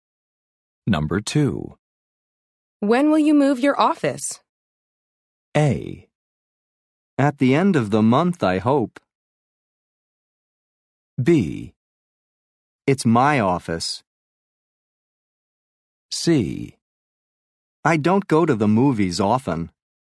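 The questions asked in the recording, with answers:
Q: When will you move your office?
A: A: At the end of the month, I hope.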